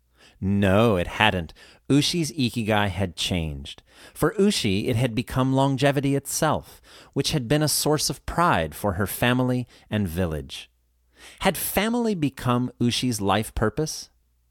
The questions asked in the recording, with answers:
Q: Had family become Ushi's life purpose?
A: No, not exactly. Longevity had become Ushi's life purpose.